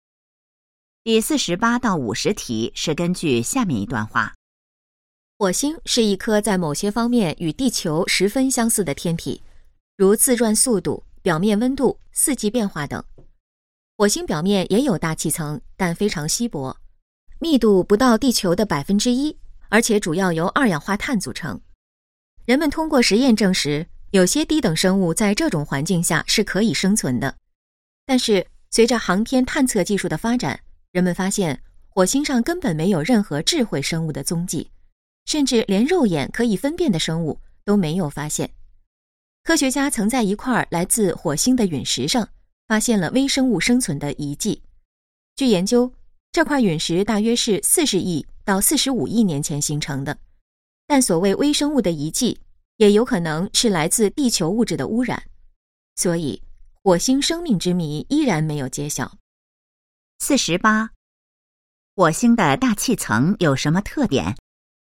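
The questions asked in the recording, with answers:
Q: 火星的大气层有什么特点?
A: 非常稀薄,主要由二氧化碳组成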